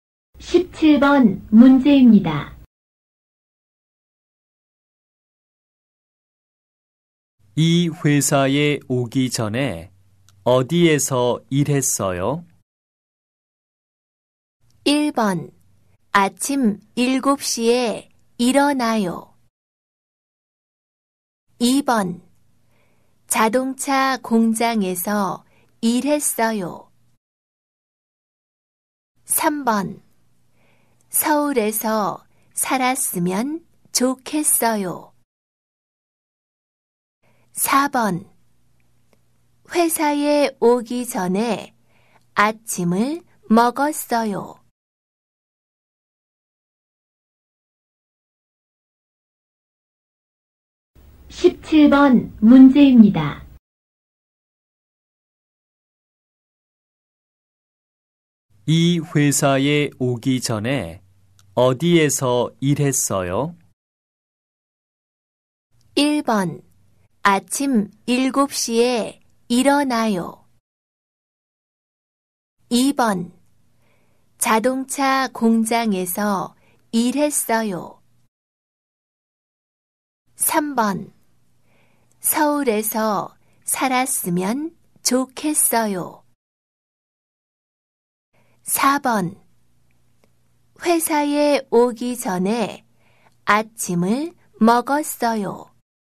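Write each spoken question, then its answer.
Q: 이 회사에 오기 전에 어디에서 일했어요?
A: 2: 자동차 공장에서 일했어요.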